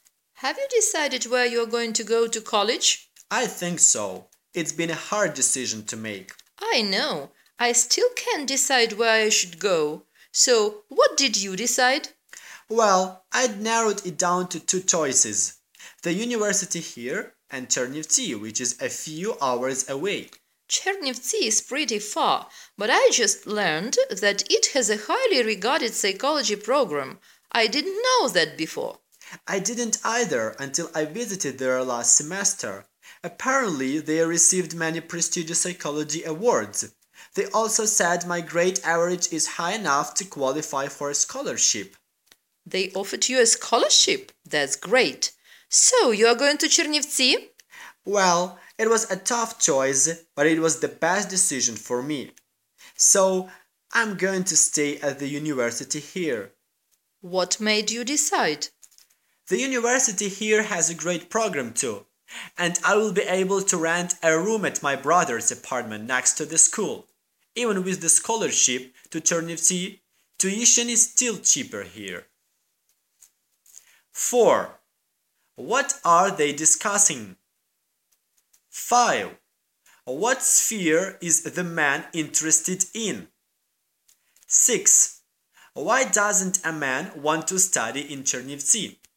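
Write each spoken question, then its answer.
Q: What are they discussing?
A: Which college or university to go to

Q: What sphere is the man interested in?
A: Psychology

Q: Why doesn't a man want to study in Chernivtsi?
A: The university here is cheaper and has a good program, and he can rent a room at his brother's apartment next to the school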